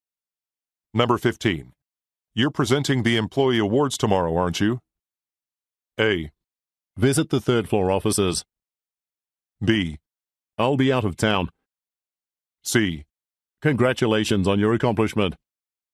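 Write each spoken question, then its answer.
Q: You're presenting the employee awards tomorrow, aren't you?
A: B: I'll be out of town.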